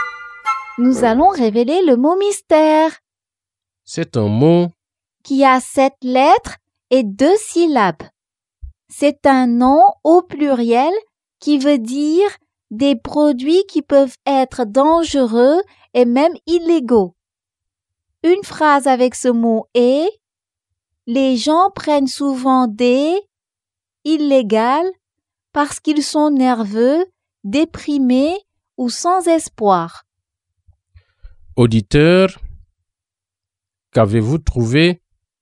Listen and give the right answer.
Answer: Le mot mystère est drogue.